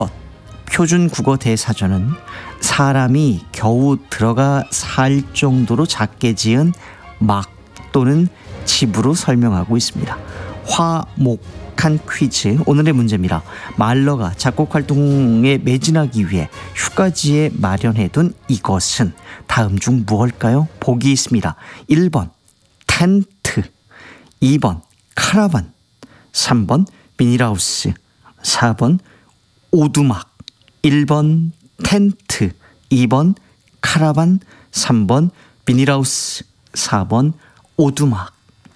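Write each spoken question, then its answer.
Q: 말러가 작곡 활동에 매진하기 위해 휴가지에 마련해둔 이것은 다음 중 무엇일까요?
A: 4: 오두막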